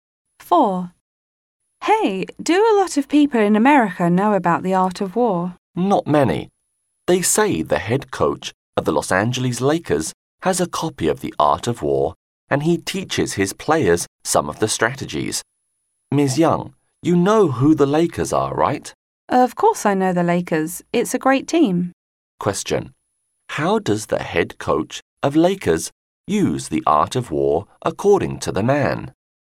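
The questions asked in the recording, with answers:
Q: How does the head coach of Lakers use The Art of War according to the man?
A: He teaches his players some of its strategies.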